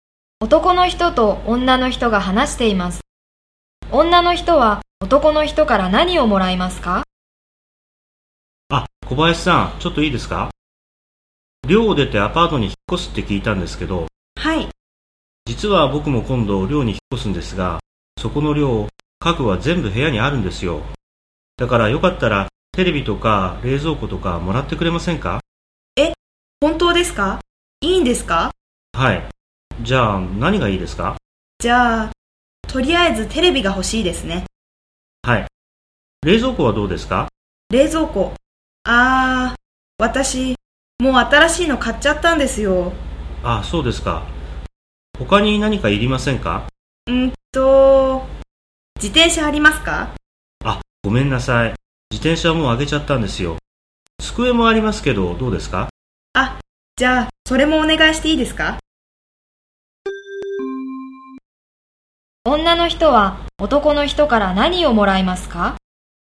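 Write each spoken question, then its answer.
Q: 女の人は男の人から何をもらいますか?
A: テレビと机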